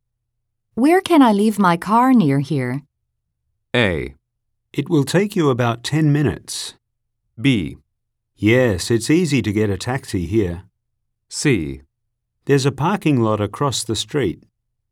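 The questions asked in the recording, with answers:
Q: Where can I leave my car near here?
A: C: There's a parking lot across the street.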